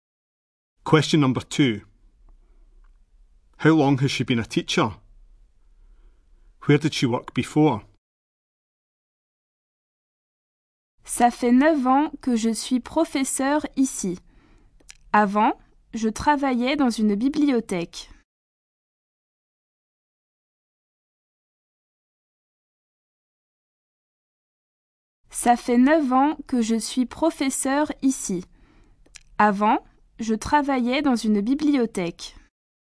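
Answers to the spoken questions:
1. 9 years
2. In a library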